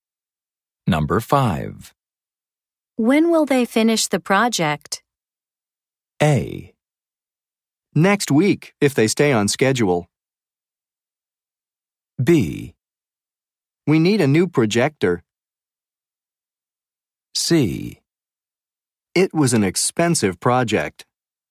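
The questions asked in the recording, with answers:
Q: When will they finish the project?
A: A: Next week, if they stay on schedule.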